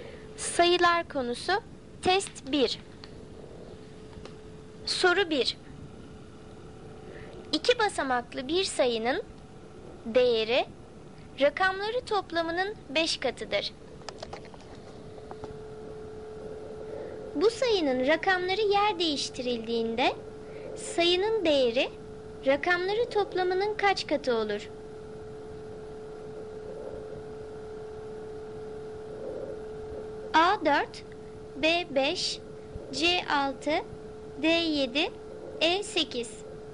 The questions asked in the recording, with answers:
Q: Bu sayının rakamları yer değiştirildiğinde sayının değeri rakamları toplamının kaç katı olur?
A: Doğru cevap C 6.